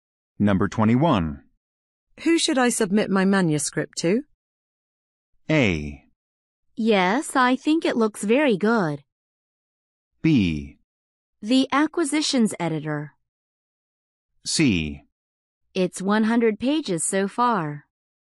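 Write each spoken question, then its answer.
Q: Who should I submit my manuscript to?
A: B: The acquisitions editor.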